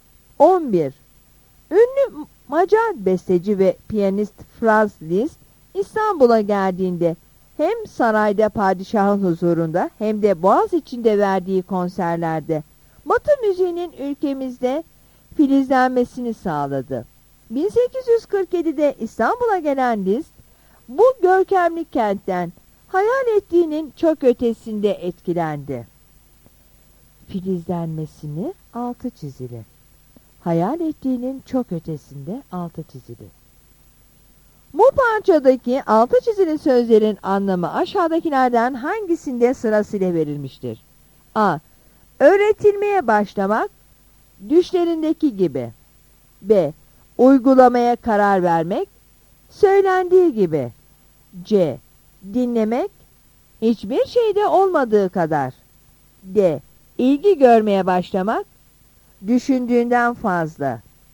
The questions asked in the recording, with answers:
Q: Bu parçadaki altı çizili sözlerin anlamı aşağıdakilerden hangisinde sırasıyla verilmiştir?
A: Yanıt D'dir.